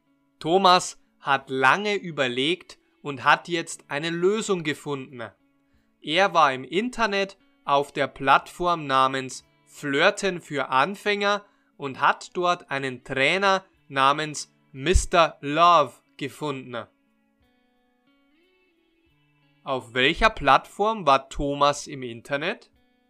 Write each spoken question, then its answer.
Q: Auf welcher Plattform war Thomas im Internet?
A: auf der Plattform Flirten für Anfänger.